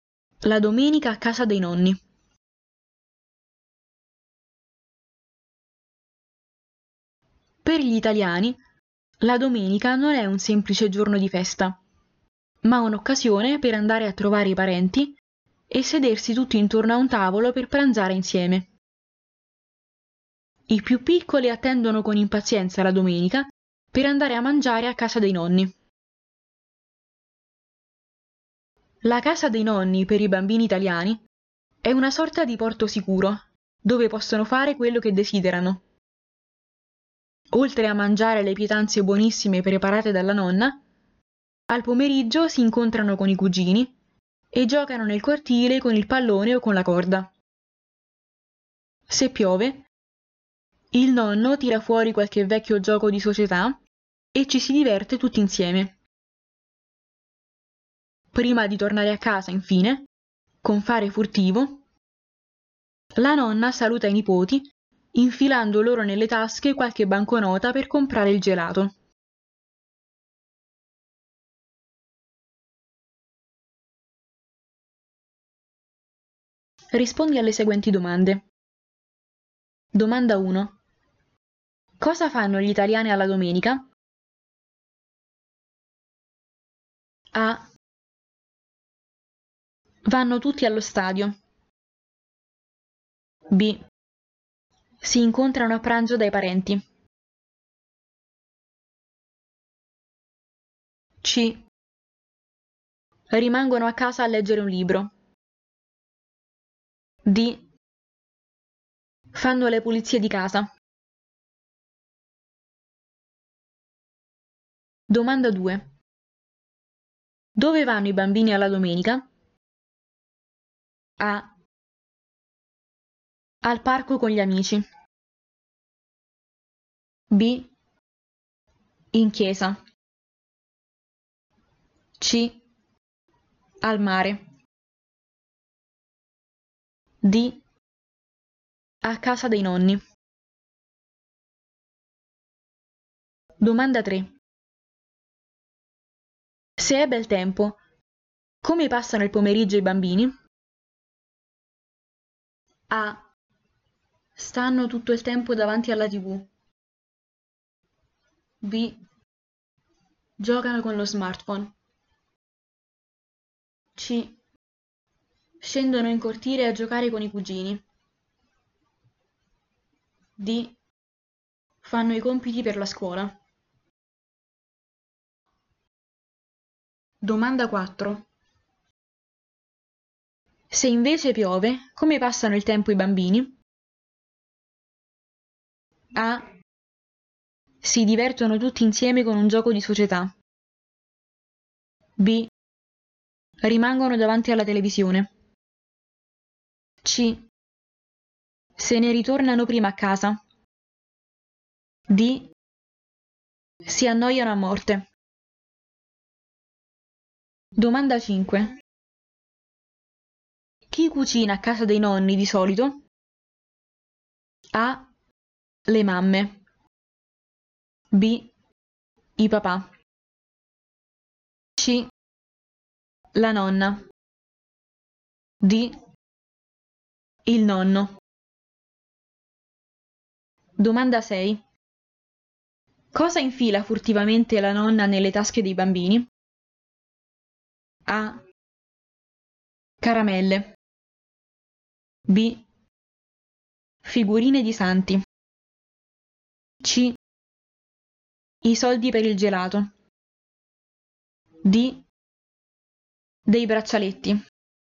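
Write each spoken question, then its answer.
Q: Cosa fanno gli italiani alla domenica?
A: B: Si incontrano a pranzo dai parenti.

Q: Dove vanno i bambini alla domenica?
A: D: A casa dei nonni.

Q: Se è bel tempo, come passano il pomeriggio i bambini?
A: C: Scendono in cortile a giocare con i cugini.

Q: Se invece piove, come passano il tempo i bambini?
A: A: Si divertono tutti insieme con un gioco di società.

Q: Chi cucina a casa dei nonni di solito?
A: C: La nonna.

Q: Cosa infila furtivamente la nonna nelle tasche dei bambini?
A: C: I soldi per il gelato.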